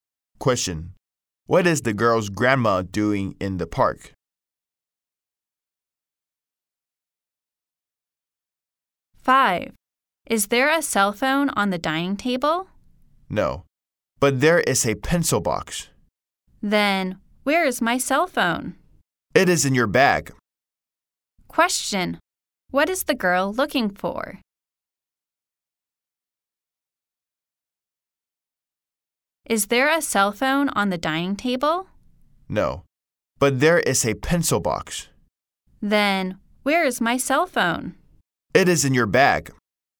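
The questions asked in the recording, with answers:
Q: What is the girl looking for?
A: Her cell phone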